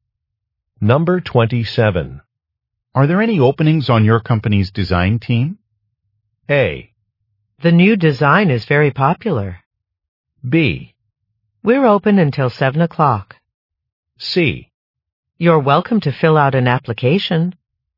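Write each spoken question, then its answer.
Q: Are there any openings on your company's design team?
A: C: You're welcome to fill out an application.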